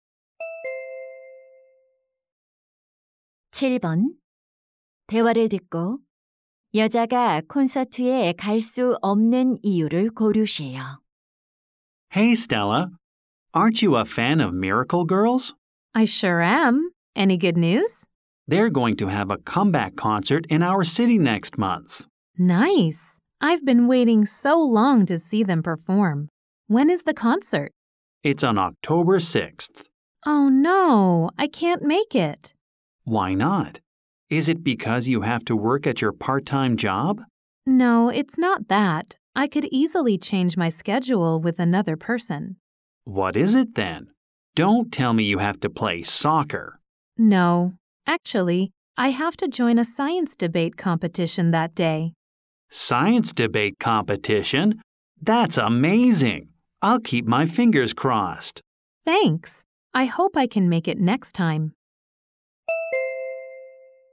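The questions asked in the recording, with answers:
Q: 여자가 콘서트에 갈 수 없는 이유를 고르세요.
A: 과학 토론 대회에 참가해야 해서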